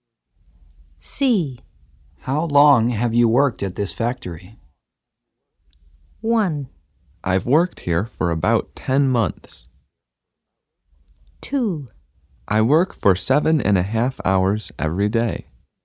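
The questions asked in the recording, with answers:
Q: How long have you worked at this factory?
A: 1: I've worked here for about 10 months.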